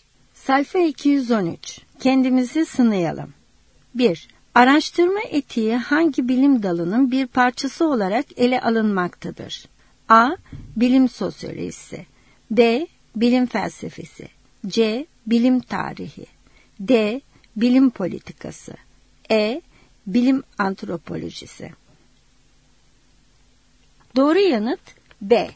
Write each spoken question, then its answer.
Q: Araştırma etiği hangi bilim dalının bir parçası olarak ele alınmaktadır?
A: Doğru yanıt B.